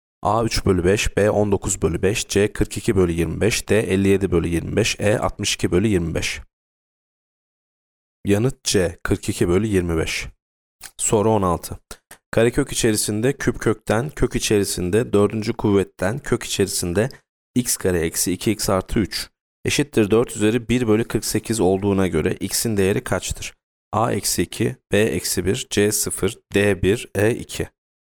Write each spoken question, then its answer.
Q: Karekök içerisinde küp kökten, kök içerisinde dördüncü kuvvetten, kök içerisinde x kare eksi 2x artı 3 eşittir 4 üzeri 1 bölü 48 olduğuna göre x'in değeri kaçtır?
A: Yanıt D 1.